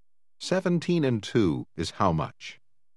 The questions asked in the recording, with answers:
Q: 17 and 2 is how much?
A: 19.